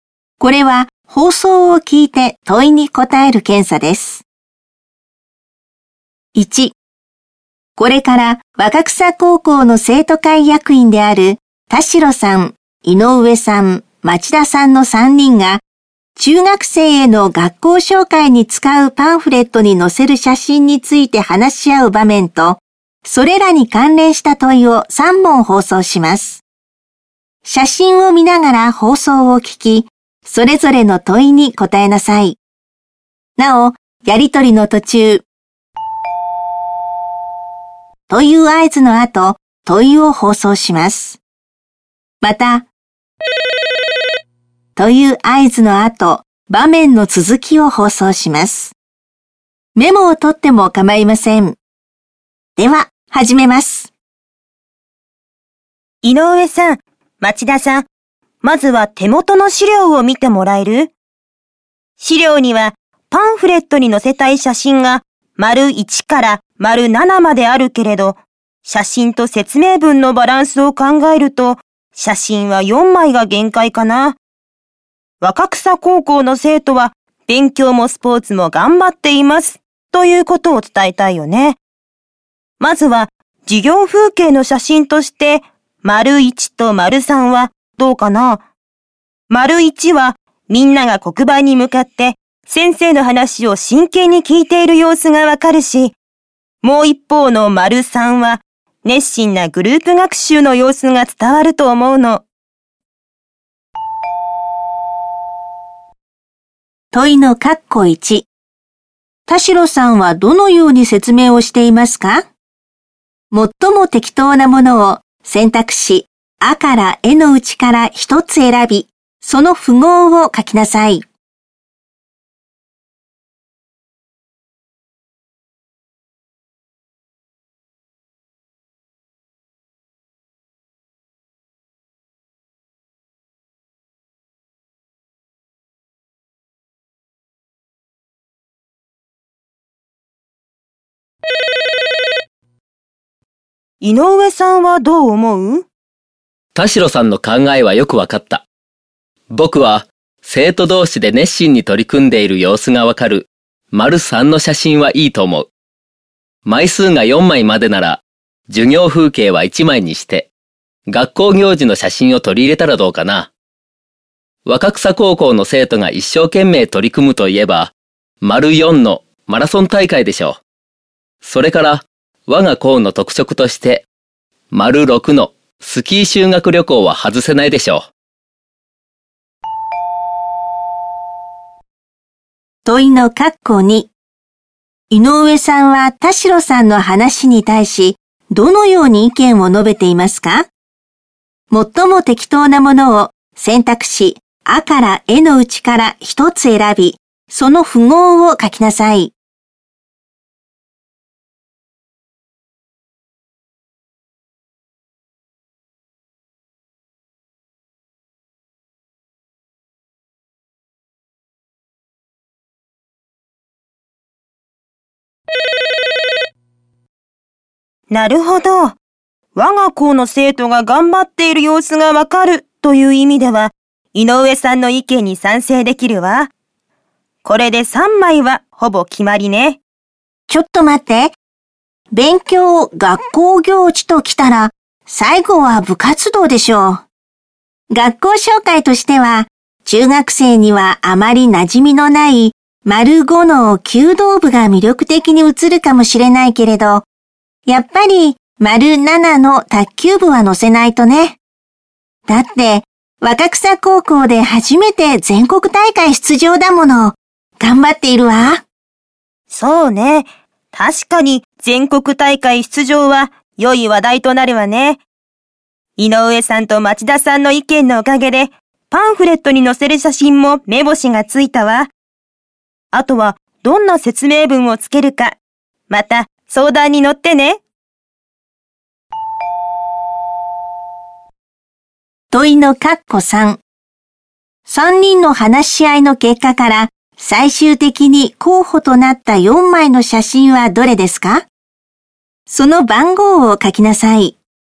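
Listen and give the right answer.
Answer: 丸3、丸4、丸6、丸7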